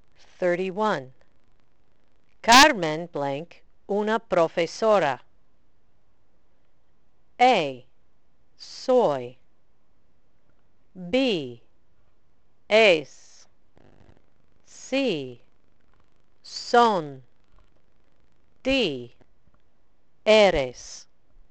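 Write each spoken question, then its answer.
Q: Carmen blank una profesora.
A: B: Es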